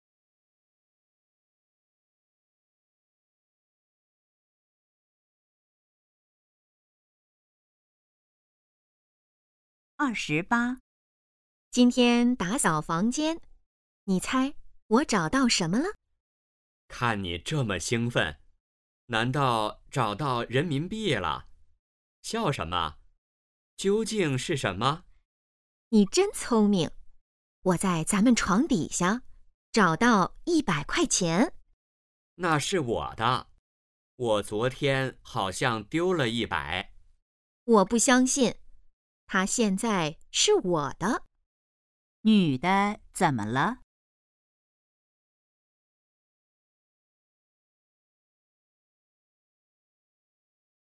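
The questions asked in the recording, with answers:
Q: 女的怎么了?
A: 找到了100块钱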